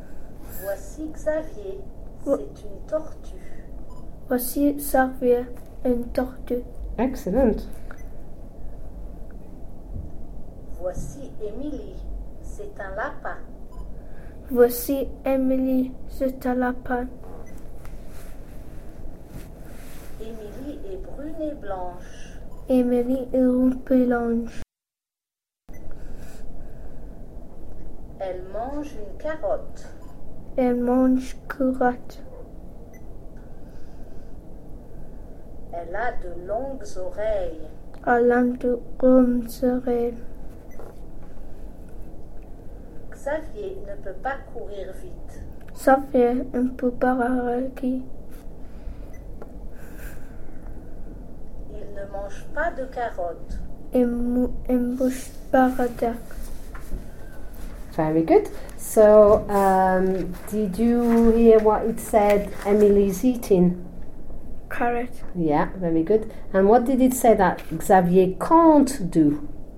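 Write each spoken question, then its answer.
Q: So, did you hear what it said Emily's eating?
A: A carrot

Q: And what did it say that Xavier can't do?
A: Run fast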